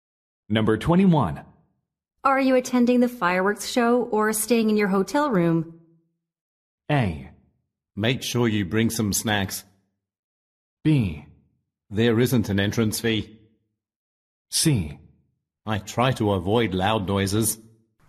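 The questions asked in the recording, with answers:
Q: Are you attending the fireworks show or staying in your hotel room?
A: C: I try to avoid loud noises.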